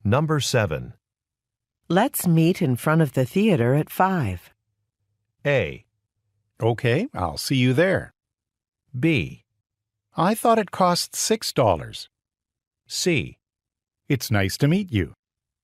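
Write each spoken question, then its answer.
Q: Let's meet in front of the theater at 5.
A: A: Okay, I'll see you there.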